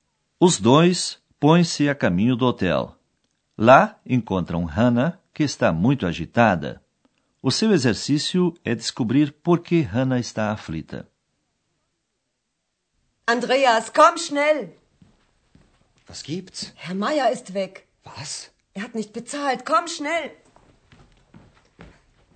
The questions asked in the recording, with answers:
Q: O seu exercício é descobrir por que Hannah está aflita.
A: Você deve ter reparado que Hannah está aflita porque o Sr.